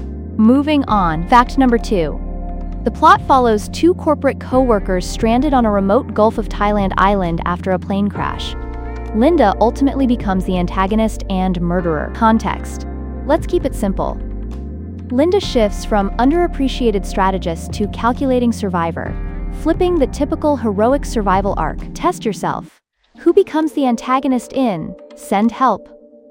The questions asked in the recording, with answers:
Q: Who becomes the antagonist in Send Help?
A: Linda.